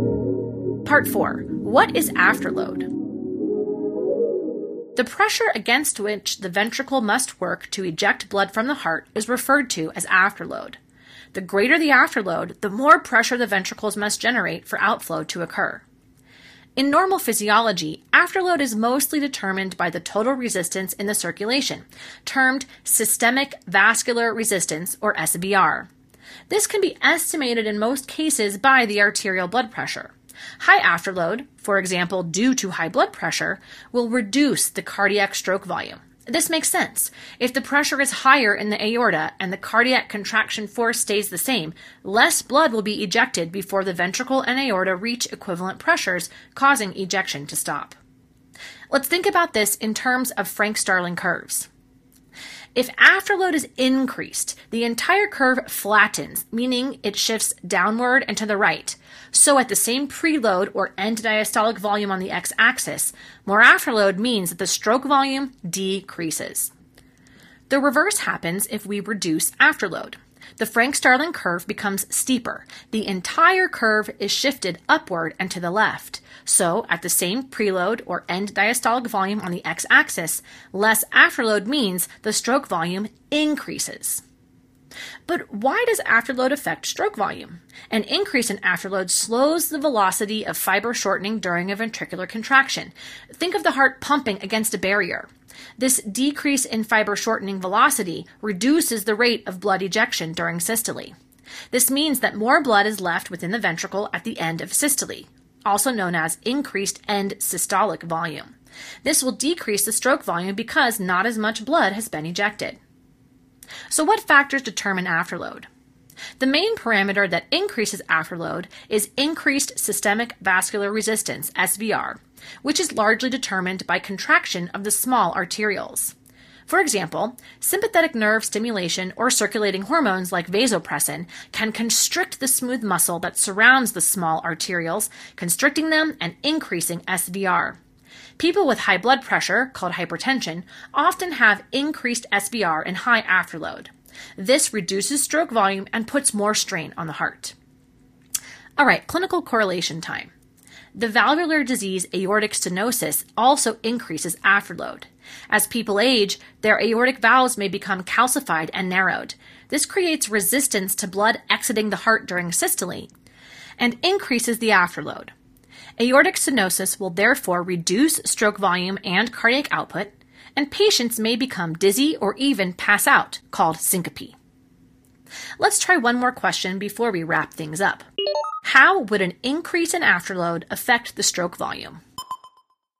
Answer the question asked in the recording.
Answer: An increase in afterload would decrease stroke volume.